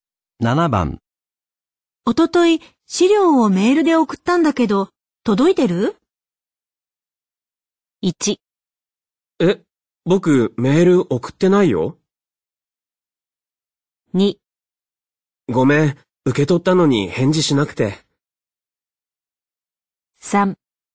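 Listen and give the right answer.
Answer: 2: ごめん、受け取ったのに返事しなくて。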